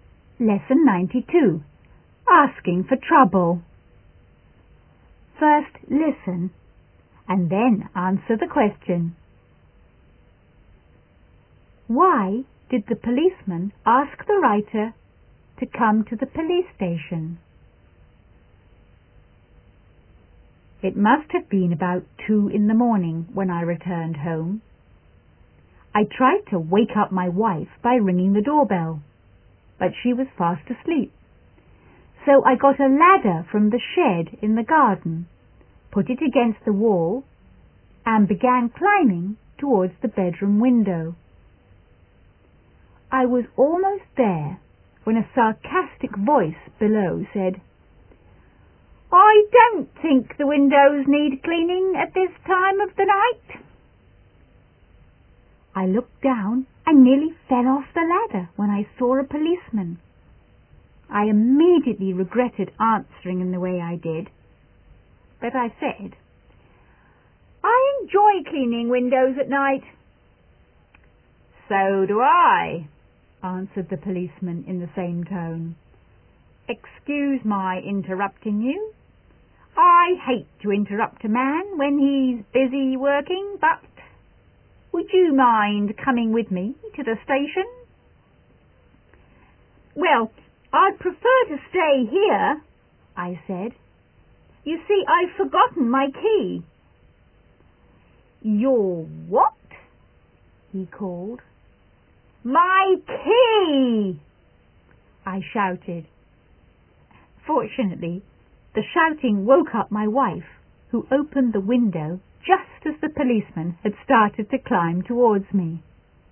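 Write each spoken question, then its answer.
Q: Why did the policeman ask the writer to come to the police station?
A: Because he saw him climbing a ladder to a window at 2 a.m. and thought he was a burglar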